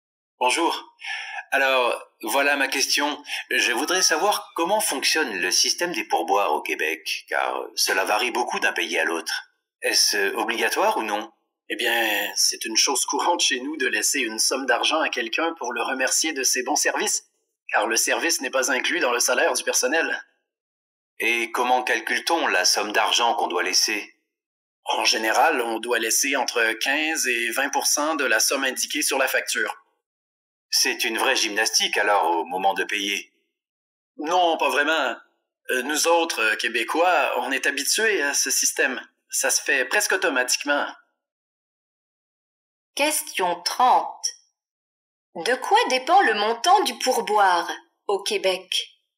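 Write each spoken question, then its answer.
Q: De quoi dépend le montant du pourboire au Québec?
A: De la somme indiquée sur la facture (15 à 20 %)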